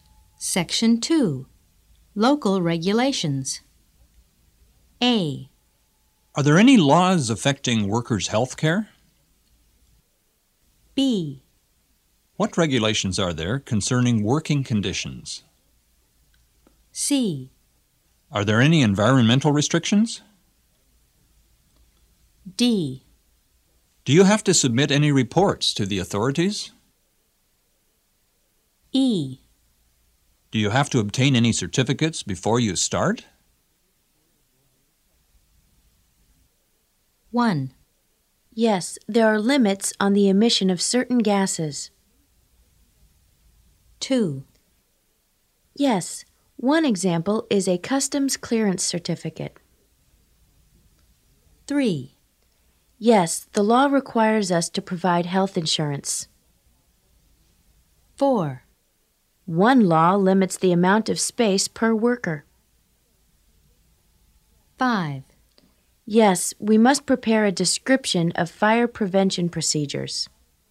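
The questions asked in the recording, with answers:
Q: Yes, there are limits on the emission of certain gases.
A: C: Are there any environmental restrictions?

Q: Yes, one example is a customs clearance certificate.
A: E: Do you have to obtain any certificates before you start?

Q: Yes, the law requires us to provide health insurance.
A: A: Are there any laws affecting workers' health care?

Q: One law limits the amount of space per worker.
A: B: What regulations are there concerning working conditions?

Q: Yes, we must prepare a description of fire prevention procedures.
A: D: Do you have to submit any reports to the authorities?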